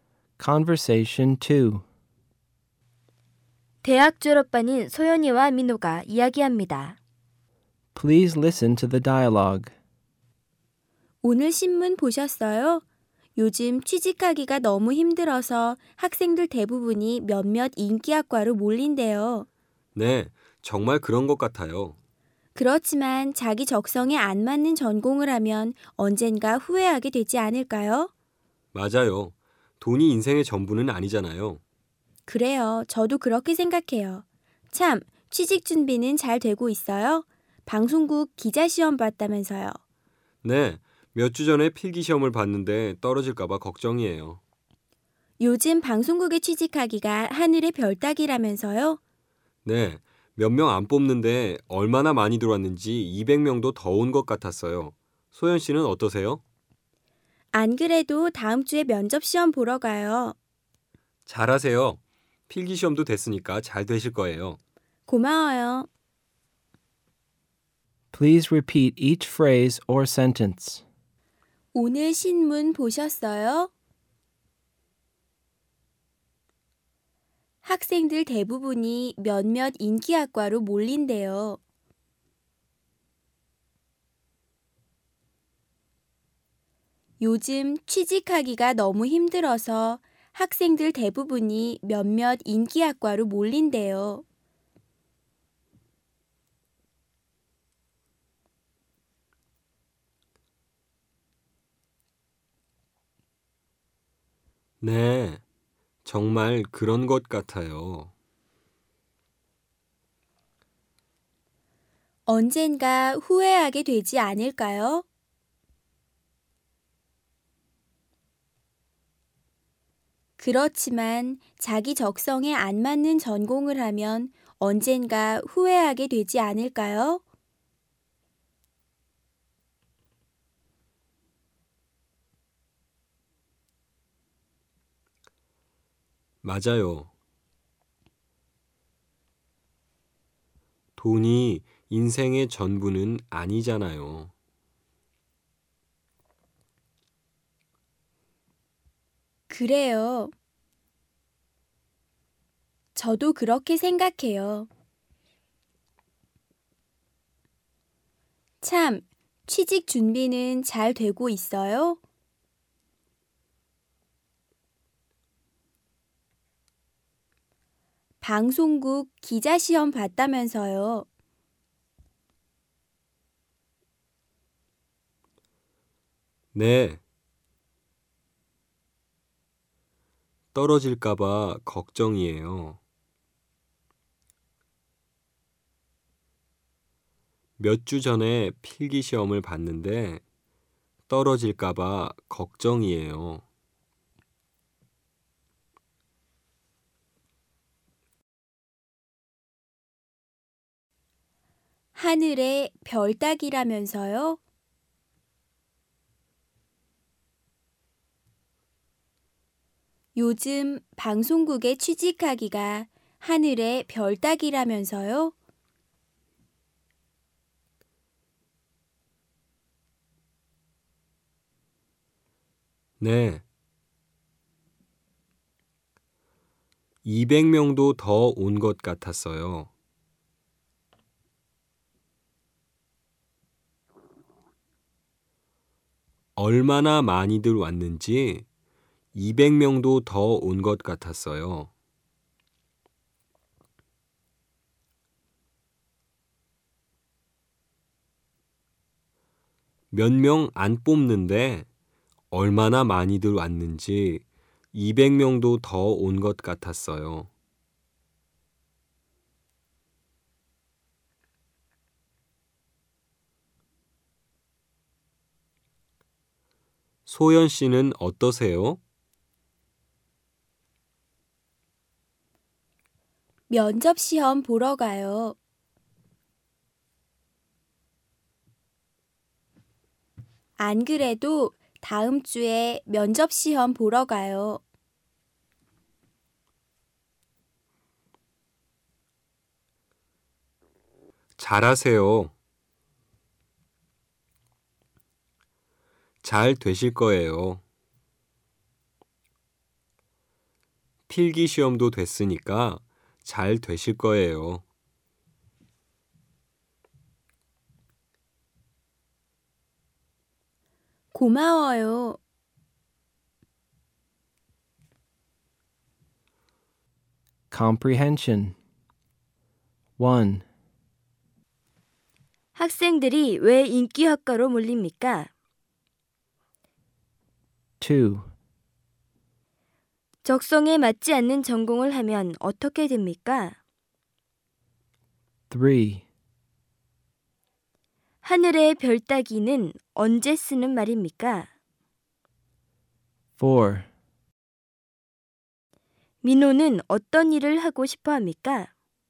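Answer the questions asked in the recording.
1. 요즘 취직하기가 너무 힘들어서
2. 언젠가 후회하게 됩니다
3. 아주 하기 어려운 일을 말할 때
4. 방송국 기자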